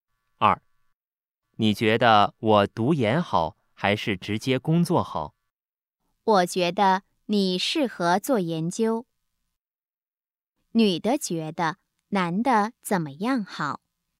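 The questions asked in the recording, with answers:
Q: 女的觉得男的怎么样好?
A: 读研(做研究)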